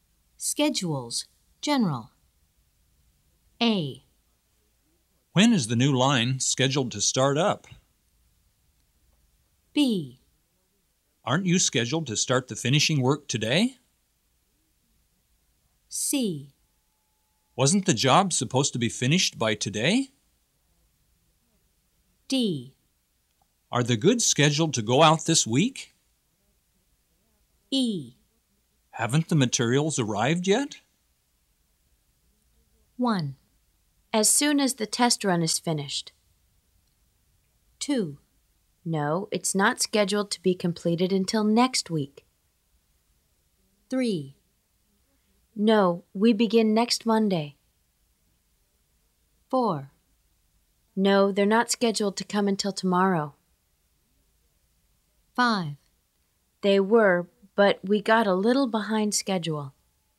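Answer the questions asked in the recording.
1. A: When is the new line scheduled to start up?
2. C: Wasn't the job supposed to be finished by today?
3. B: Aren't you scheduled to start the finishing work today?
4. E: Haven't the materials arrived yet?
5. D: Are the goods scheduled to go out this week?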